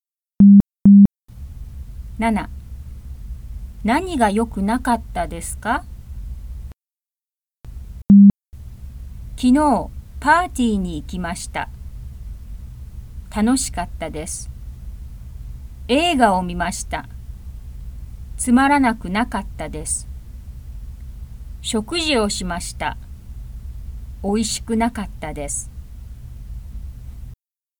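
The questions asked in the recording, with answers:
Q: 何が良くなかったですか?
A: 食事(おいしくなかった)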